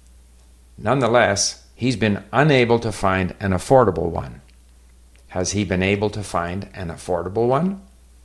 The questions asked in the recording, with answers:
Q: Has he been able to find an affordable one?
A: No, he's been unable to find an affordable one.